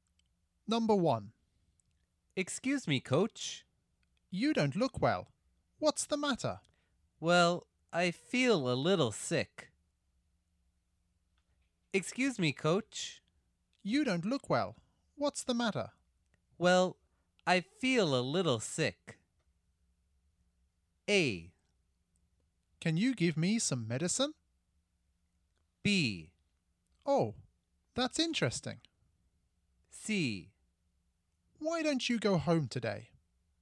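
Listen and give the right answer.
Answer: C: Why don't you go home today?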